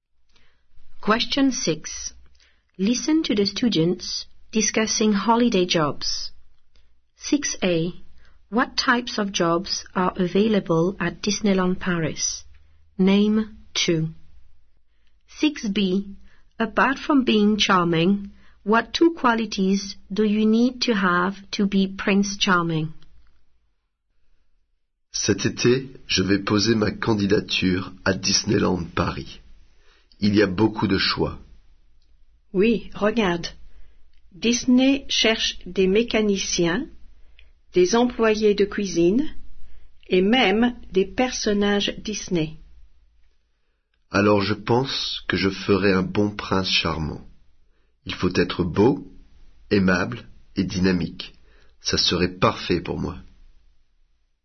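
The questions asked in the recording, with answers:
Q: What types of jobs are available at Disneyland Paris?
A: mechanics, kitchen staff, Disney characters

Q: Apart from being charming, what two qualities do you need to have to be Prince Charming?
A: good-looking and dynamic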